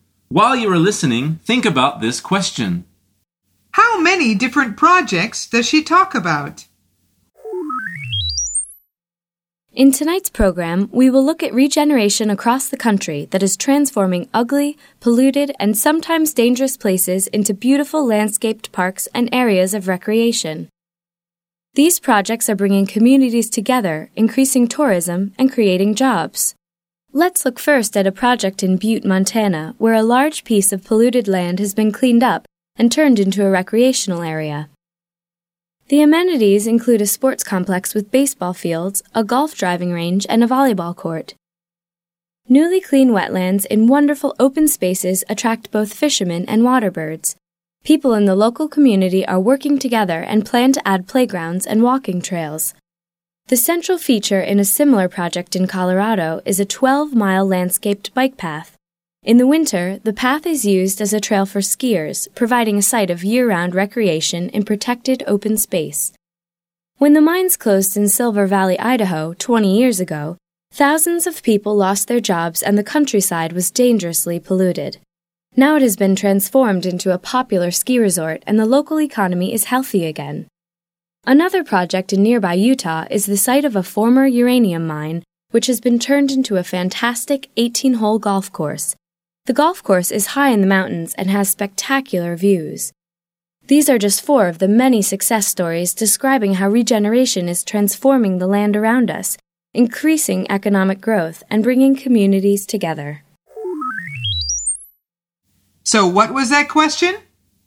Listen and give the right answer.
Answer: The answer is four.